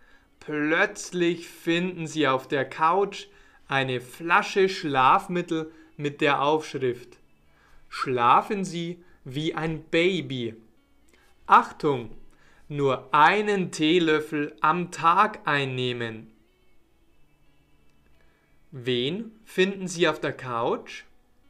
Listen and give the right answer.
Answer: Eine Flasche Schlafmittel.